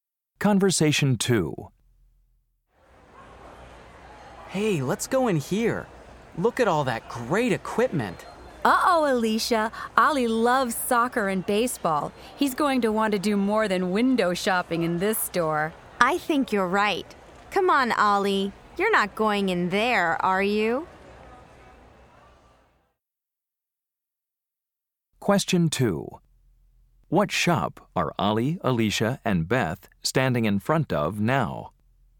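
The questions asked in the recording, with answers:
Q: What shop are Ollie, Alicia, and Beth standing in front of now?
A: a sporting goods store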